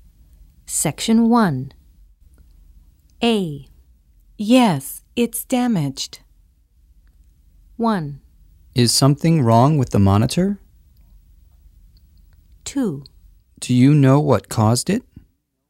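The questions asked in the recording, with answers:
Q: Yes, it's damaged.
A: 1: Is something wrong with the monitor?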